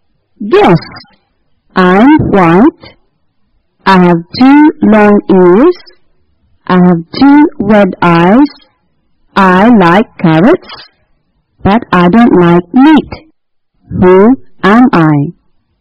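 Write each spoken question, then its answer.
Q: I like carrots, but I don't like meat. Who am I?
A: a rabbit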